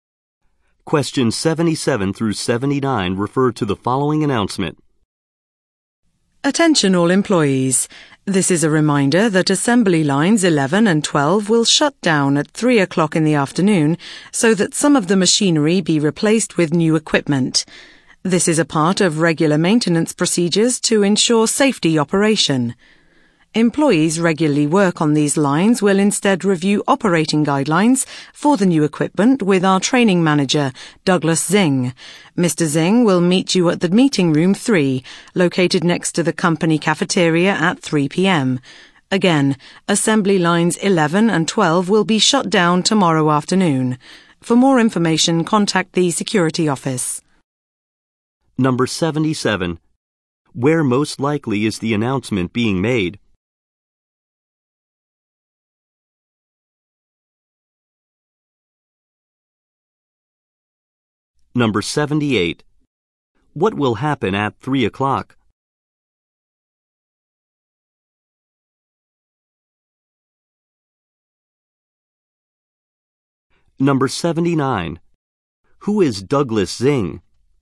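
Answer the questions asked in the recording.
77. At a factory
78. Assembly lines 11 and 12 will shut down to replace machinery
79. A training manager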